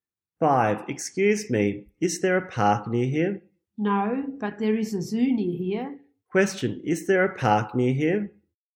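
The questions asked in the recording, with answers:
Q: Question, is there a park near here?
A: No, but there is a zoo.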